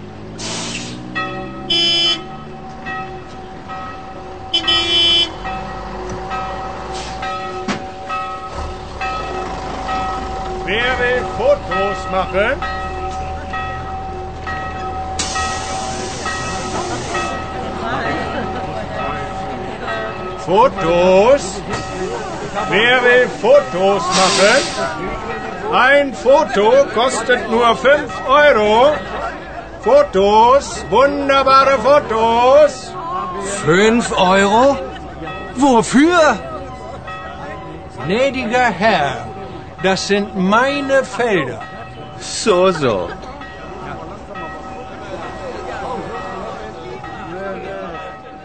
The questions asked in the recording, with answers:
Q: Que propose le villageois?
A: Il ne fait que proposer aux touristes de faire eux-mêmes des photos.